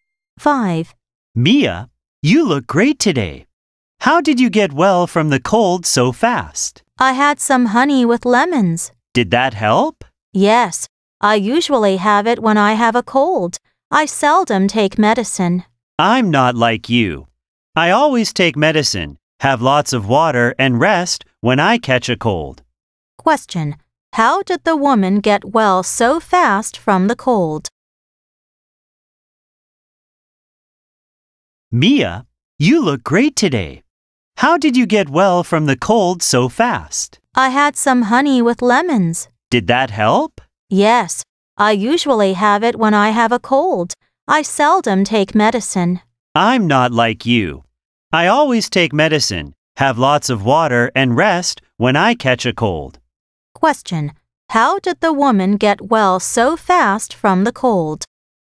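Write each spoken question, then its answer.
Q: How did the woman get well so fast from the cold?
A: She had some honey with lemons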